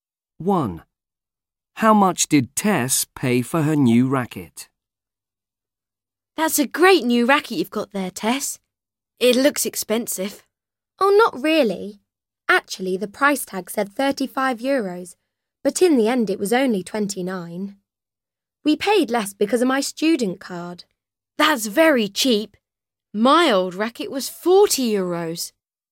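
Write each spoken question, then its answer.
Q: How much did Tess pay for her new racket?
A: 29 euros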